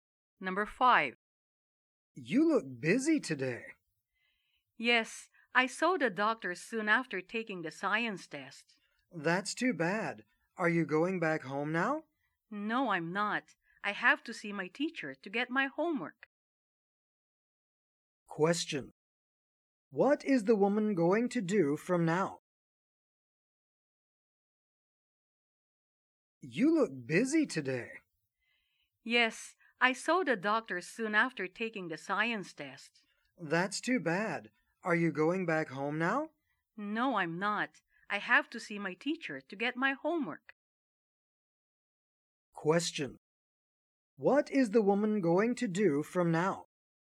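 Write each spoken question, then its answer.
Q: What is the woman going to do from now?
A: See her teacher to get her homework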